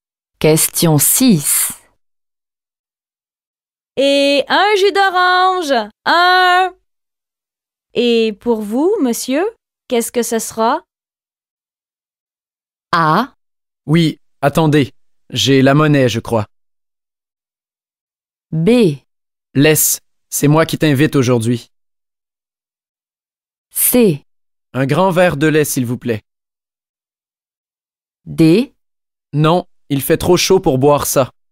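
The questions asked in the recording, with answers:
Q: Et un jus d'orange, un. Et pour vous, monsieur, qu'est-ce que ce sera?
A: C: Un grand verre de lait, s'il vous plaît.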